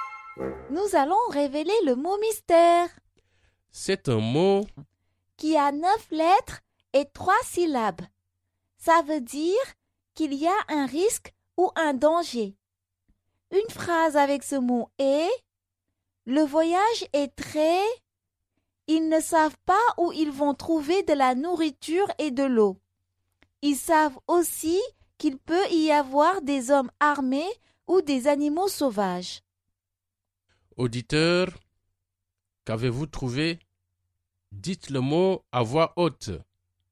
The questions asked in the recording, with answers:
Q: Auditeur, qu'avez-vous trouvé?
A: Le mot mystère est dangereux.